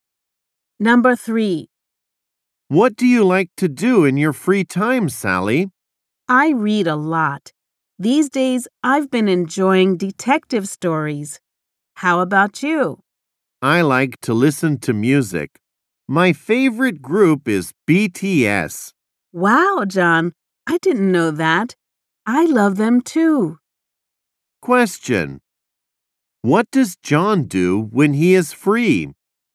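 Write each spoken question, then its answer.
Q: What does John do when he is free?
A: He listens to music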